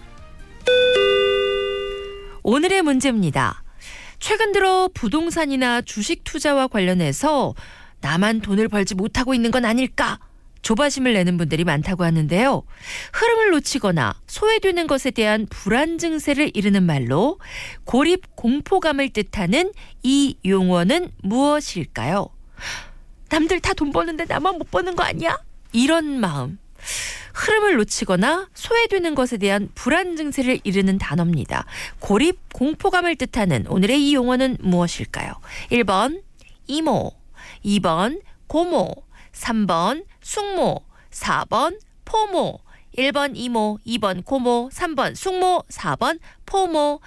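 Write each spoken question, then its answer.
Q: 고립 공포감을 뜻하는 오늘의 이 용어는 무엇일까요?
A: 4: 포모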